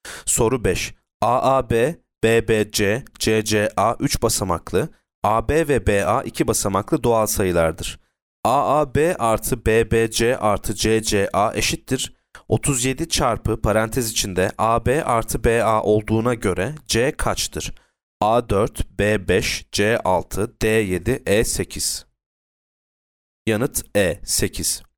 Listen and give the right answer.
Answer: Yanıt E 8.